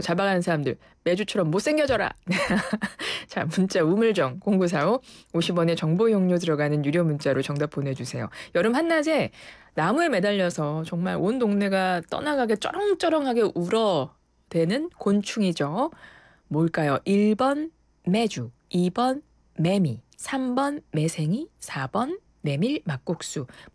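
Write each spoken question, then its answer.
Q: 뭘까요? 1번 매주, 2번 매미, 3번 매생이, 4번 메밀 막국수.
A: 2: 매미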